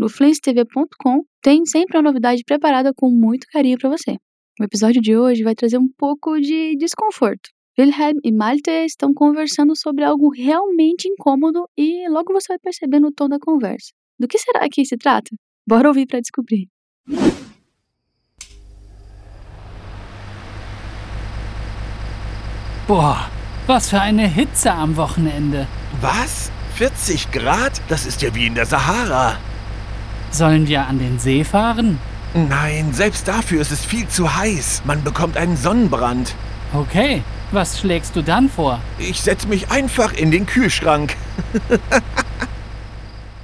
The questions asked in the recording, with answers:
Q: Do que será que se trata?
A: A palavra-chave aqui é Hitze, que significa calor.